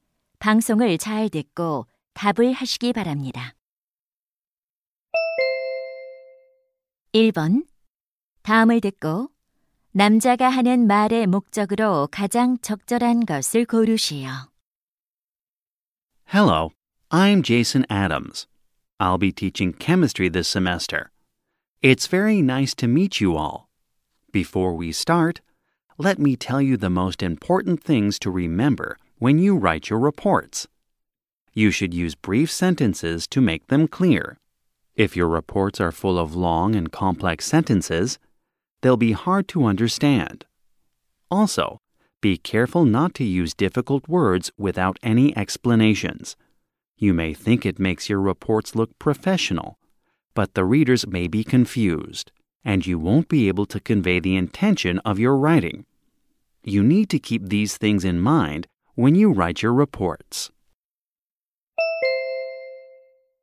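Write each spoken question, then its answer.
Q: 다음을 듣고 남자가 하는 말의 목적으로 가장 적절한 것을 고르시오.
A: 보고서를 쓸 때 짧은 문장과 쉬운 단어를 사용하라고 당부하려고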